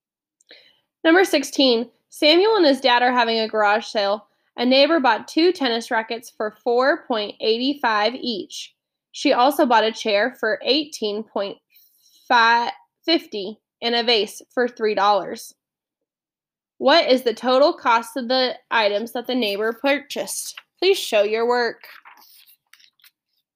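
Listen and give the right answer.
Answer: $31.20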